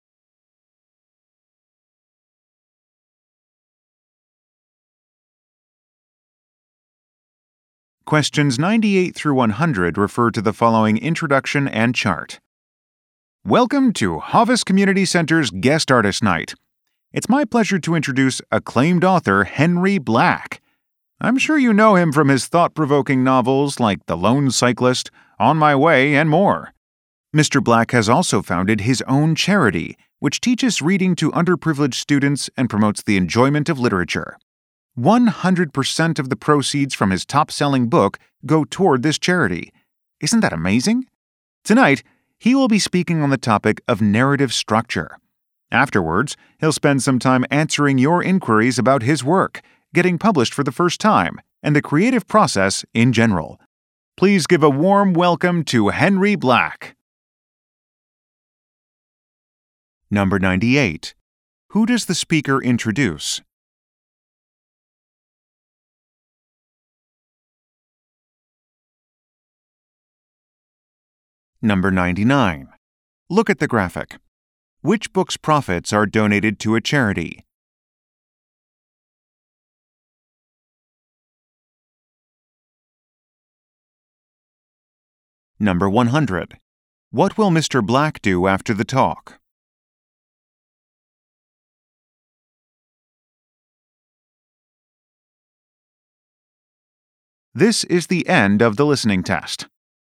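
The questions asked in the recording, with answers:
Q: Who does the speaker introduce?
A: An author, Henry Black

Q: Black do after the talk?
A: Answer questions from the audience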